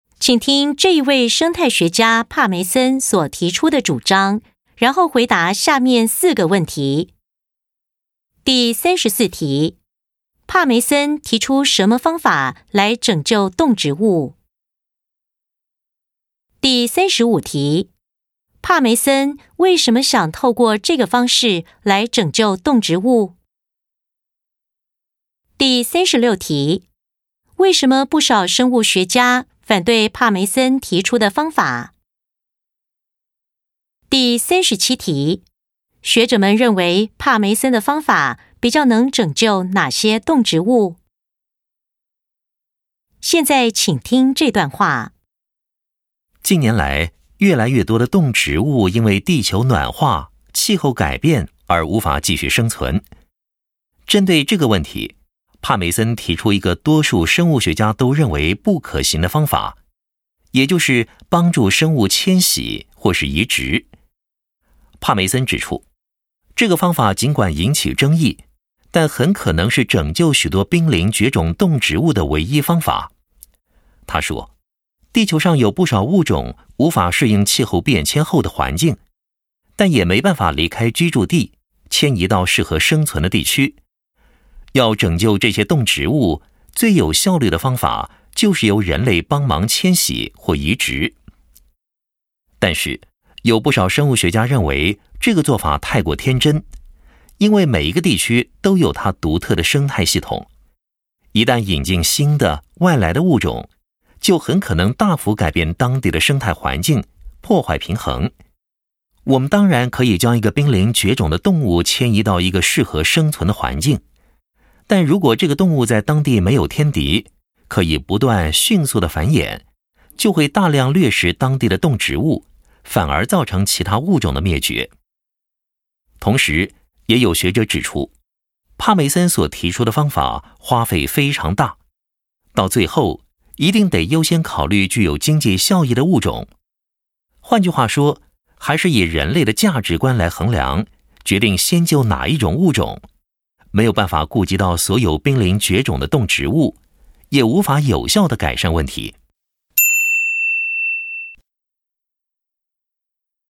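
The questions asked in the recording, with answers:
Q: 帕梅森提出什么方法来拯救动植物?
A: 由人类帮助生物迁徙或移植

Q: 帕梅森为什么想透过这个方式来拯救动植物?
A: 不少物种无法适应气候变迁,又没办法自己迁移到适合生存的地区,这可能是唯一的方法

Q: 为什么不少生物学家反对帕梅森提出的方法?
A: 引进外来物种可能大幅改变当地生态环境,破坏生态平衡

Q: 学者们认为帕梅森的方法比较能拯救哪些动植物?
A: 具有经济效益的物种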